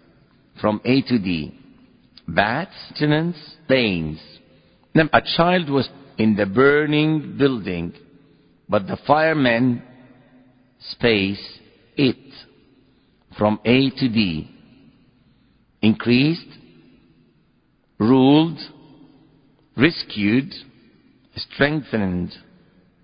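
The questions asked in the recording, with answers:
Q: A child was in the burning building, but the firemen, space, it.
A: C: rescued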